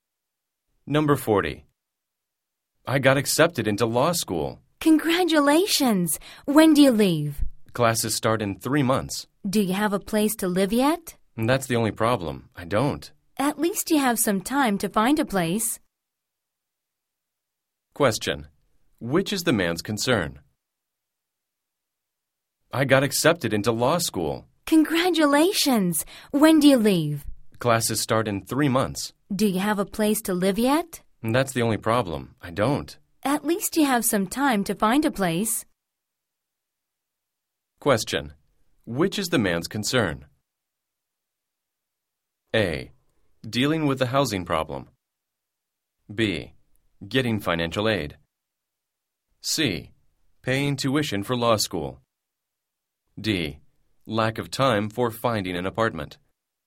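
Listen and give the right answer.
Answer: A: Dealing with the housing problem.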